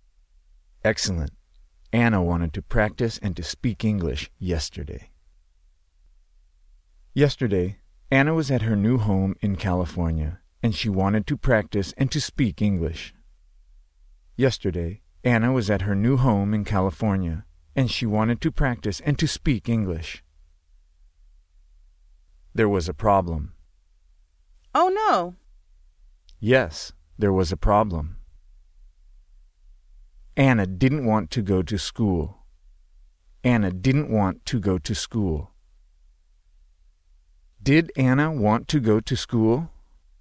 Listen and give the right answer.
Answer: No.